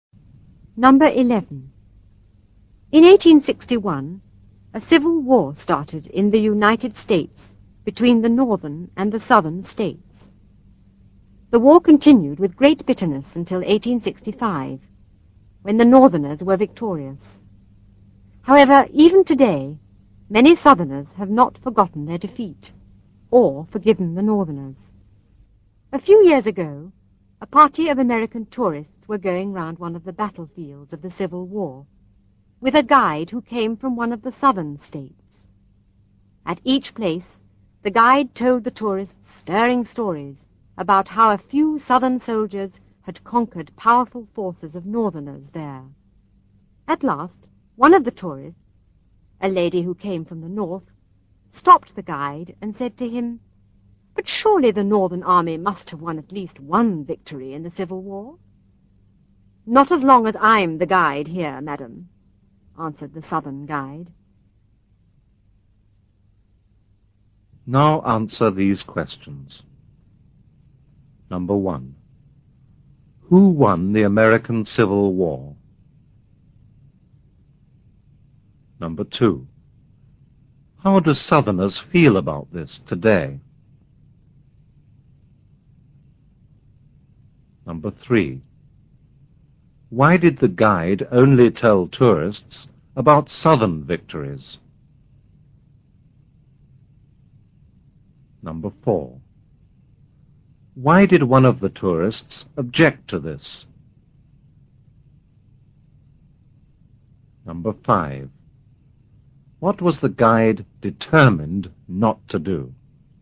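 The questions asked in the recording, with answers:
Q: Who won the American Civil War?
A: The northerners

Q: How do Southerners feel about this today?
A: Many have not forgotten their defeat or forgiven the northerners

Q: Why did the guide only tell tourists about Southern victories?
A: Because he came from the South and had not forgiven the northerners for the defeat

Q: Why did one of the tourists object to this?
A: She came from the North

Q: What was the guide determined not to do?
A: Tell tourists about any Northern victory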